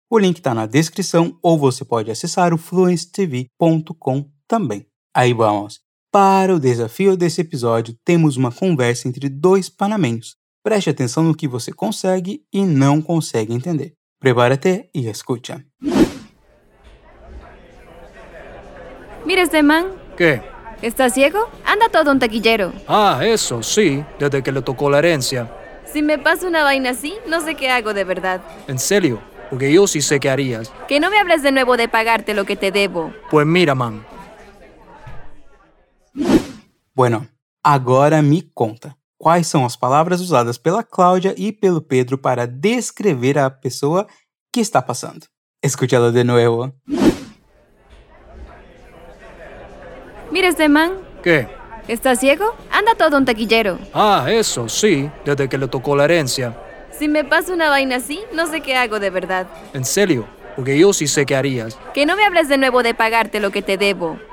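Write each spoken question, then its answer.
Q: Bueno, agora me conta, quais são as palavras usadas pela Cláudia e pelo Pedro para descrever a pessoa que está passando?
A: "man" e "taquillero" (anda todo un taquillero)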